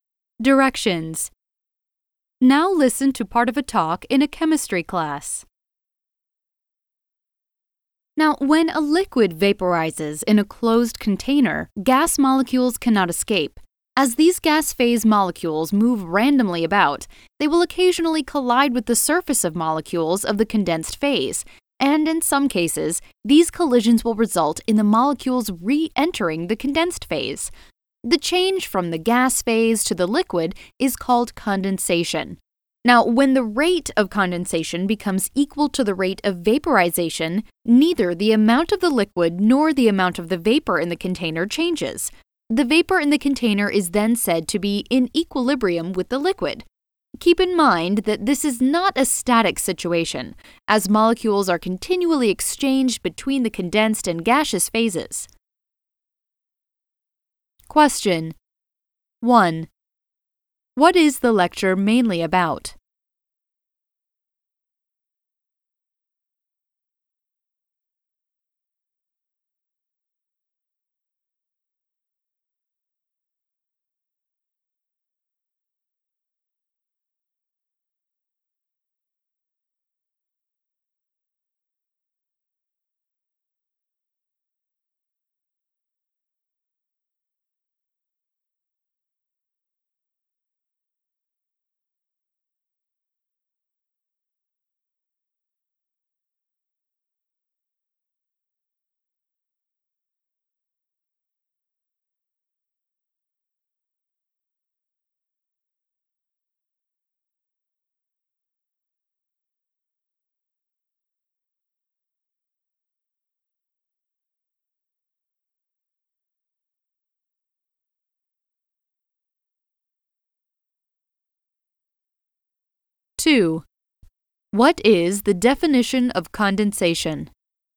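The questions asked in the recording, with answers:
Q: What is the definition of condensation?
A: The change from the gas phase to the liquid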